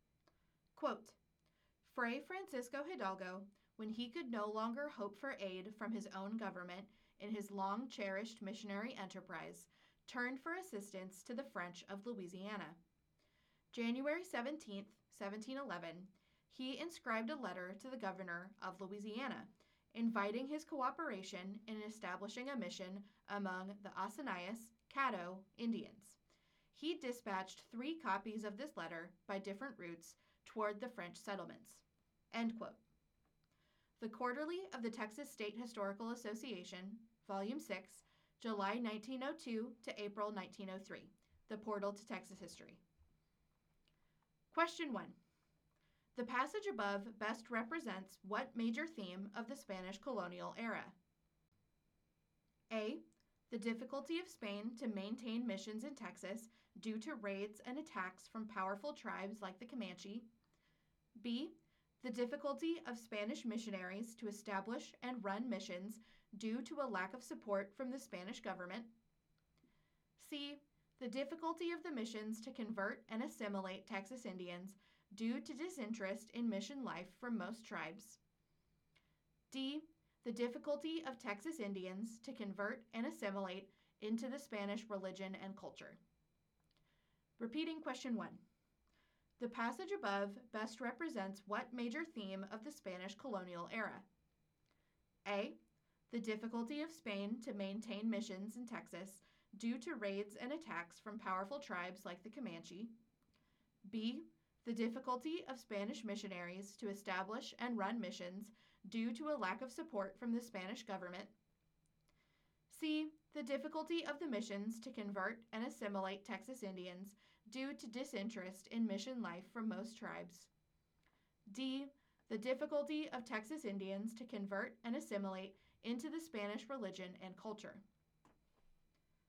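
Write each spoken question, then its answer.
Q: The passage above best represents what major theme of the Spanish colonial era?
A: B: The difficulty of Spanish missionaries to establish and run missions due to a lack of support from the Spanish government.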